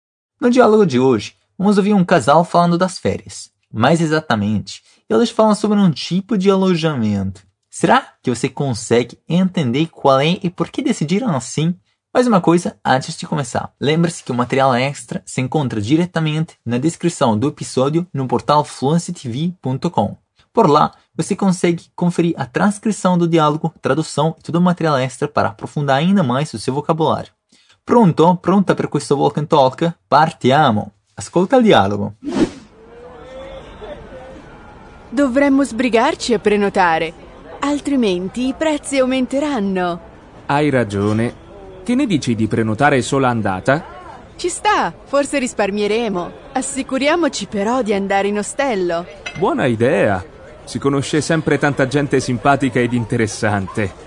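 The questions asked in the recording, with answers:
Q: Será que você consegue entender qual é e por que decidiram assim?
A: Um hostel (ostello), porque lá sempre se conhece muita gente simpática e interessante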